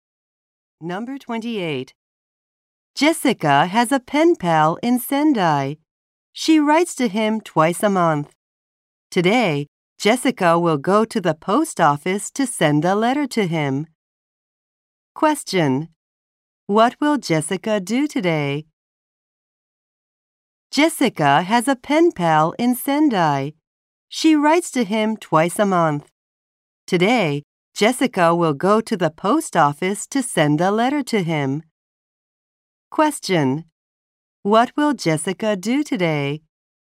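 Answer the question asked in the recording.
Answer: Go to the post office to send a letter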